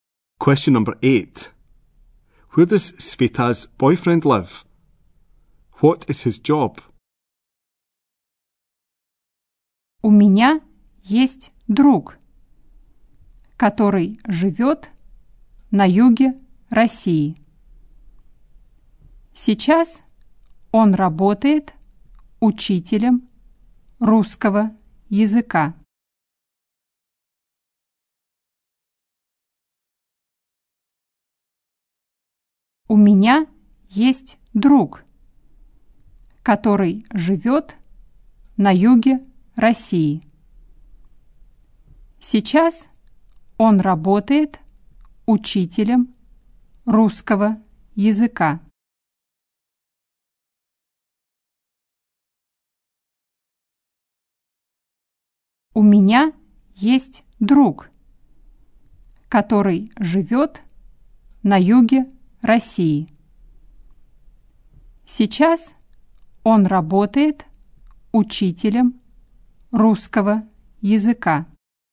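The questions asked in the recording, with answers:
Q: Where does Sveta's boyfriend live?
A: In the south of Russia

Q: What is his job?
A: Russian teacher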